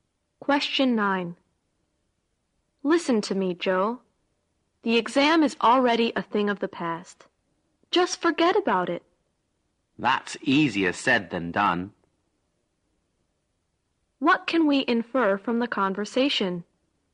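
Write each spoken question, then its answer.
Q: What can we infer from the conversation?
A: Joe finds it hard to stop worrying about the exam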